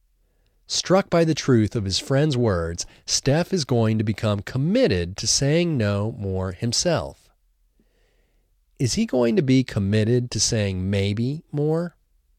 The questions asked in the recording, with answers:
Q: Is he going to be committed to saying maybe more?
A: No, he isn't going to be committed to saying maybe more.